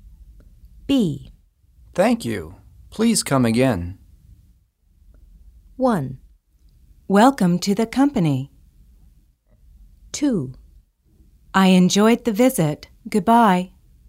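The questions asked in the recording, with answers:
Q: Thank you. Please come again.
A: 2: I enjoyed the visit. Goodbye.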